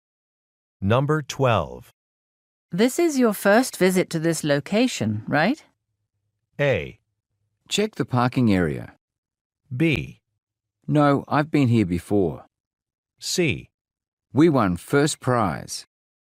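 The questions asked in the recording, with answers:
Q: This is your first visit to this location, right?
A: B: No, I've been here before.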